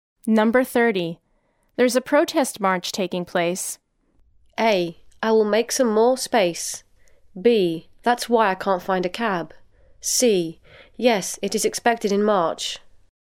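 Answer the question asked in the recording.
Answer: B: That's why I can't find a cab.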